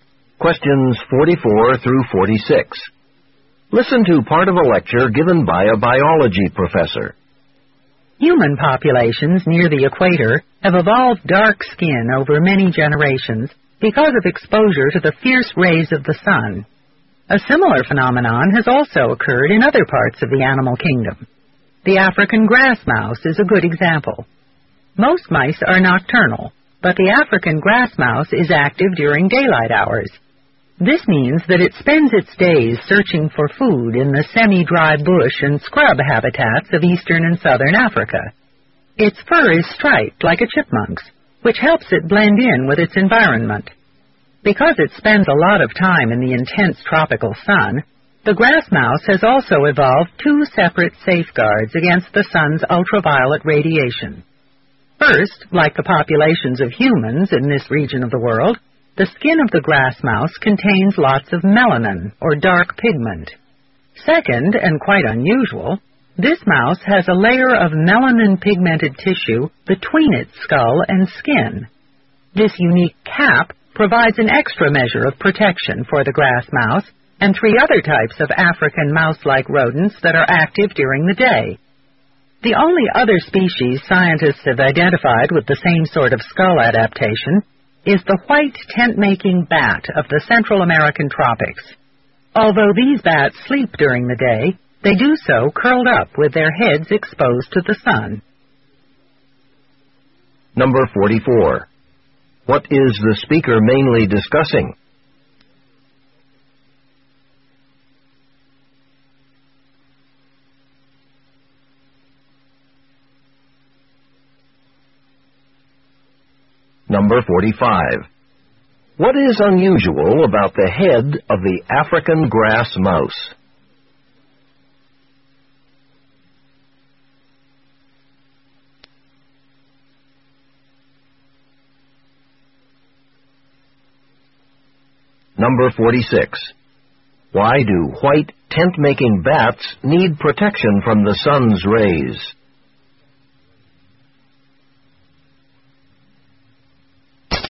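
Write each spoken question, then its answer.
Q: What is the speaker mainly discussing?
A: How some animals have evolved protection against the sun's ultraviolet rays

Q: What is unusual about the head of the African grass mouse?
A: It has a layer of melanin-pigmented tissue between its skull and skin

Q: Why do white tent-making bats need protection from the sun's rays?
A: They sleep during the day with their heads exposed to the sun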